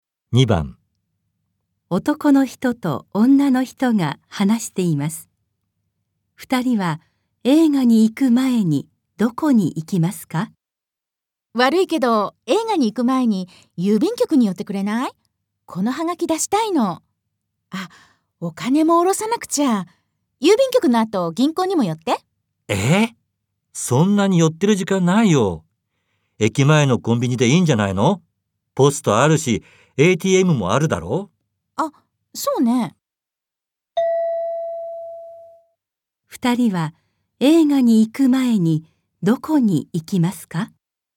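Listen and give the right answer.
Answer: 駅前のコンビニ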